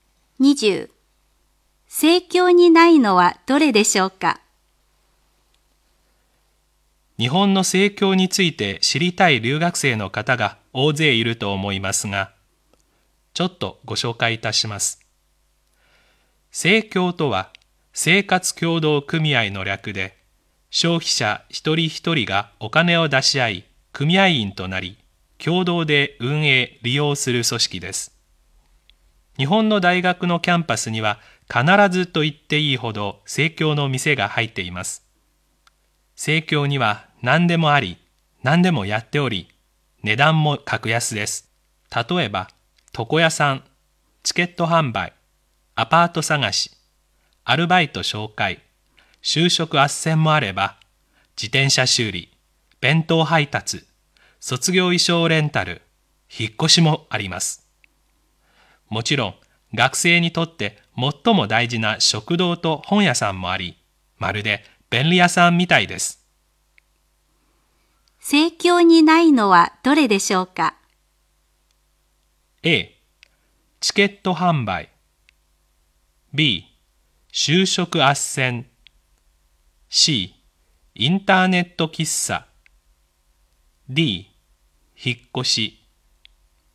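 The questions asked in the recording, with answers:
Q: 盛況にないのはどれでしょうか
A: C: インターネット喫茶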